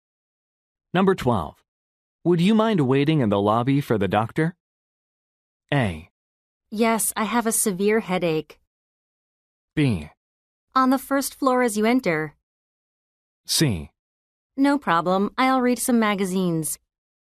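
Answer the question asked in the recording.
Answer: C: No problem, I'll read some magazines.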